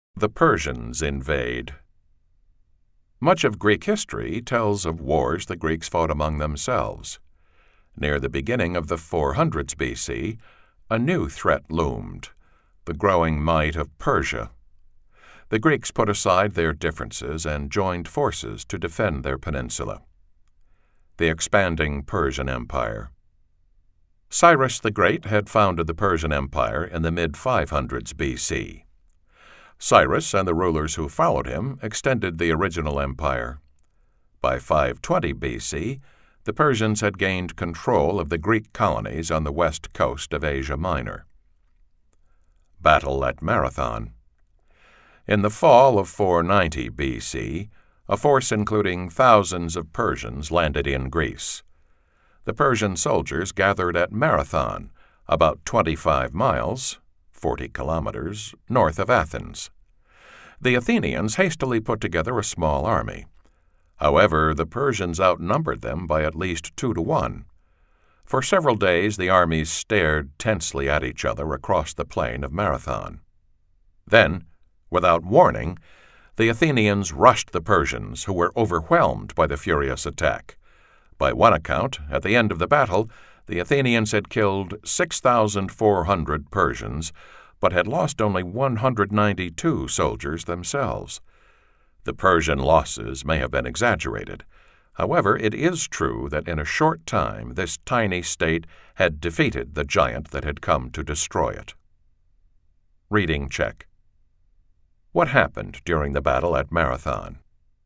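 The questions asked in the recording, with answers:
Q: What happened during the battle at Marathon?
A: The Athenians made a surprise attack on the larger Persian force and defeated it.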